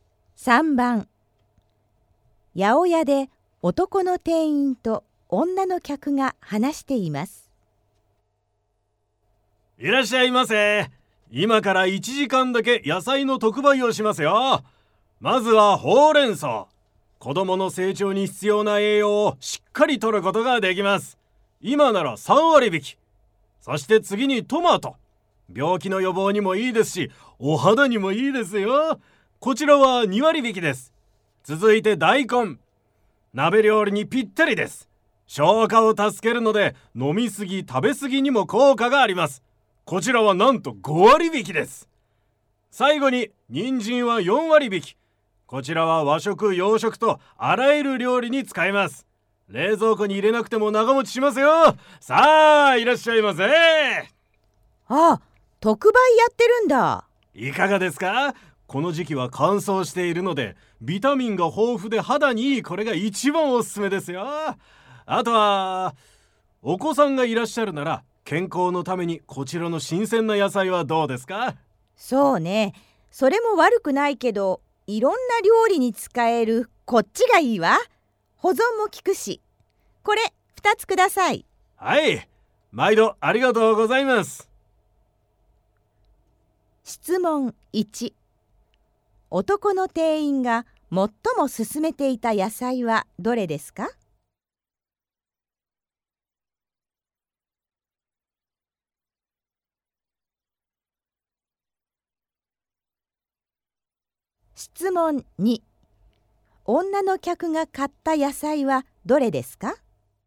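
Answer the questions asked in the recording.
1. トマト
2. 人参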